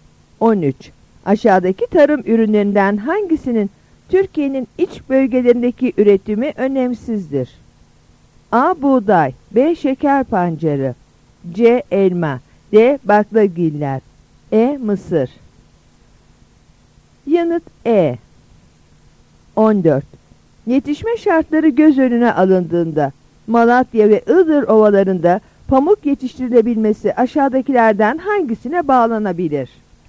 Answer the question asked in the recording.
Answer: Yanıt E.